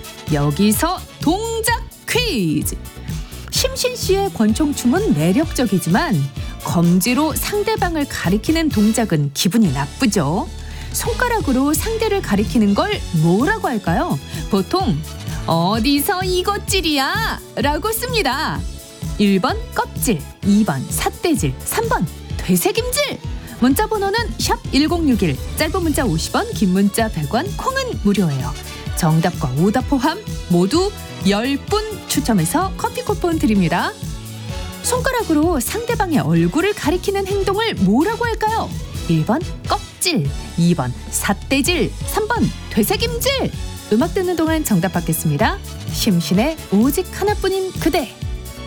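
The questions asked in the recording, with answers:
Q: 손가락으로 상대방의 얼굴을 가리키는 행동을 뭐라고 할까요?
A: 2: 삿대질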